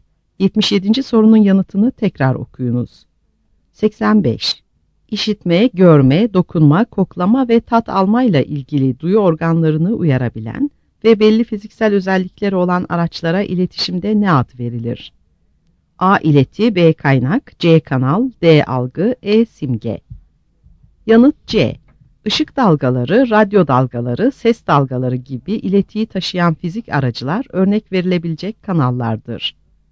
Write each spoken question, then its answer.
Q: İşitme, görme, dokunma, koklama ve tat almayla ilgili duyu organlarını uyarabilen ve belli fiziksel özellikleri olan araçlara iletişimde ne ad verilir?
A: Yanıt C.